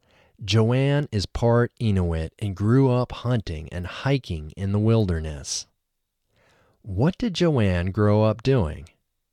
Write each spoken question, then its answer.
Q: What did Joanne grow up doing?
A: Joanne grew up hunting and hiking in the wilderness.